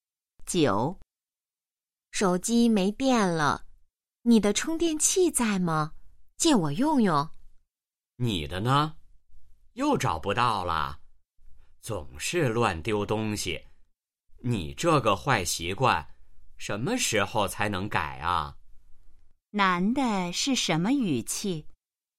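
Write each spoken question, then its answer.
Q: 男的是什么语气?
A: 责备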